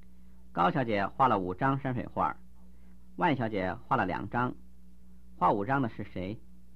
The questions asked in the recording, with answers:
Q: 画5张的是谁?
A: 画5张的是高小姐。